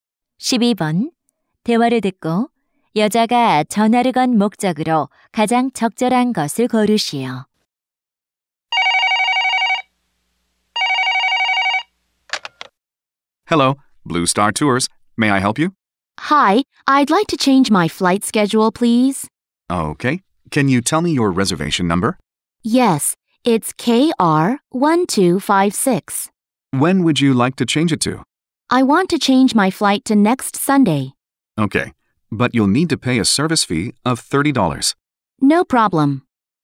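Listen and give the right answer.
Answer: 비행 일정을 변경하려고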